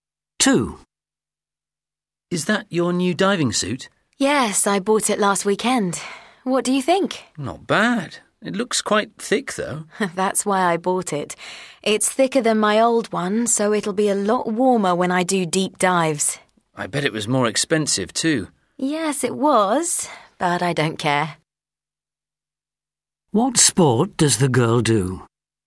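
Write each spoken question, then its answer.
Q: What sport does the girl do?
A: Diving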